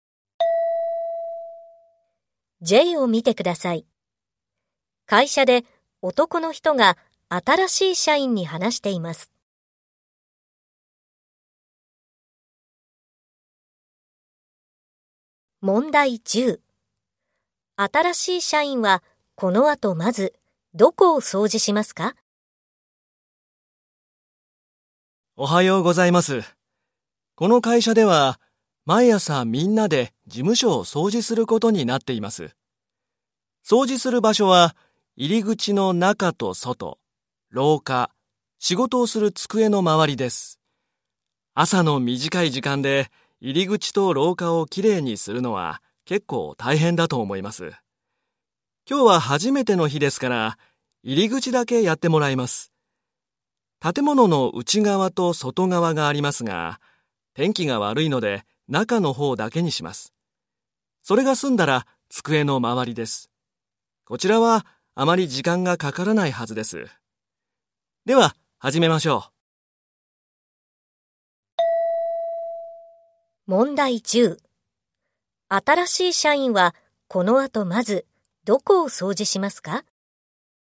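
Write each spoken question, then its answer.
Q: 新しい社員はこの後まずどこを掃除しますか?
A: 入り口の中(内側)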